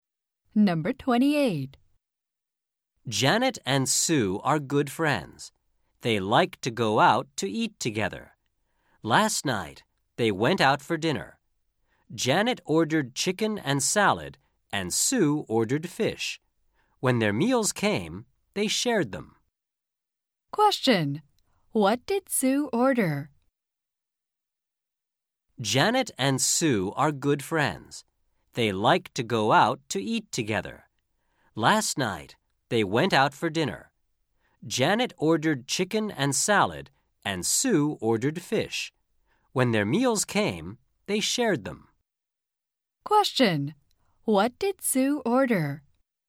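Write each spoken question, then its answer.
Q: what did Sue order?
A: Fish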